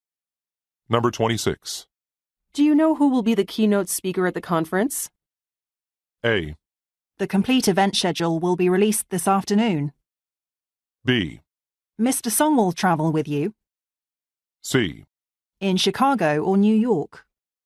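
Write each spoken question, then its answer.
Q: Do you know who will be the keynote speaker at the conference?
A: A: The complete event schedule will be released this afternoon.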